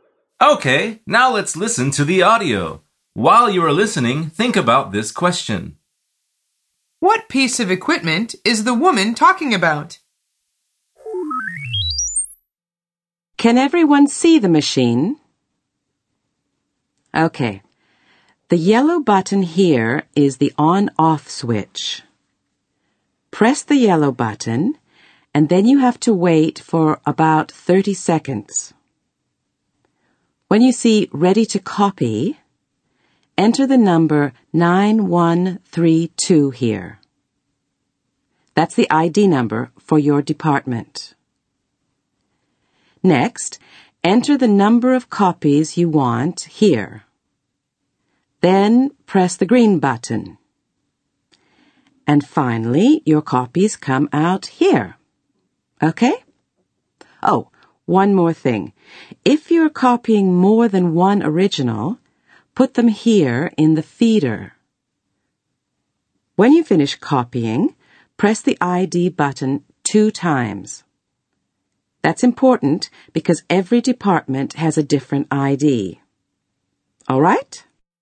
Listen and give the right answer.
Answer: she is talking about a copy machine.